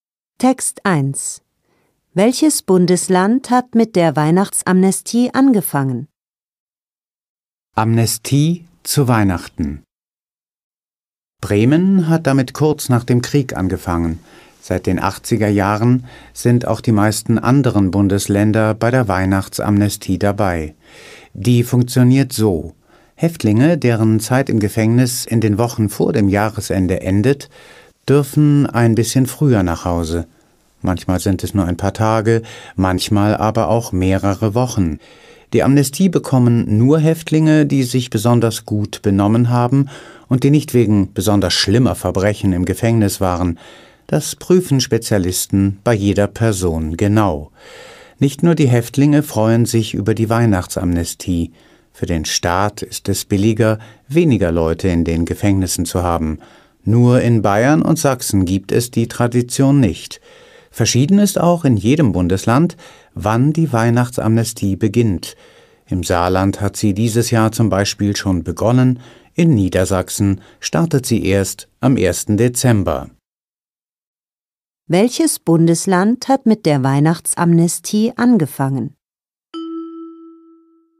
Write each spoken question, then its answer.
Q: Welches Bundesland hat mit der Weihnachtsamnestie angefangen?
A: Bremen.